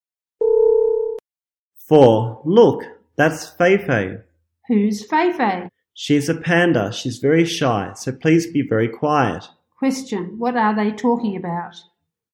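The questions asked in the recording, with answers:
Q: Question, what are they talking about?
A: A panda (Fei Fei)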